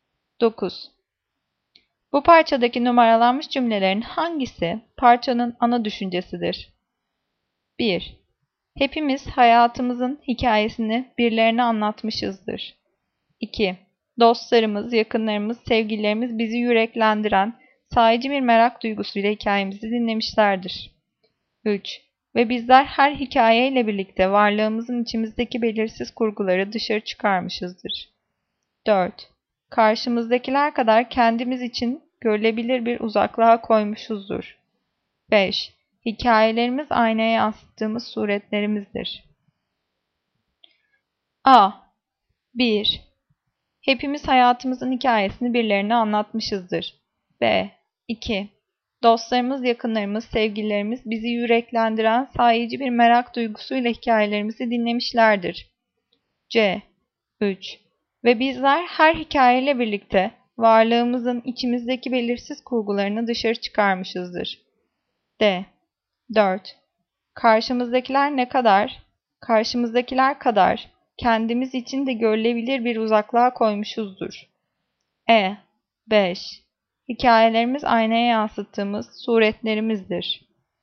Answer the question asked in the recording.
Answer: Cevap E. Hikayelerimiz aynaya yansıttığımız suretlerimizdir.